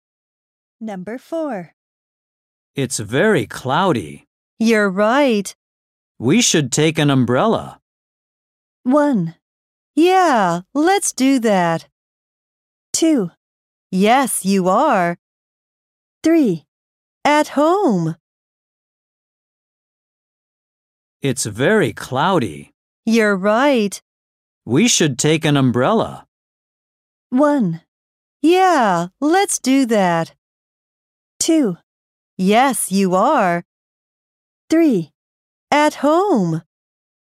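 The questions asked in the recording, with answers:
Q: We should take an umbrella.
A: 1: Yeah, let's do that.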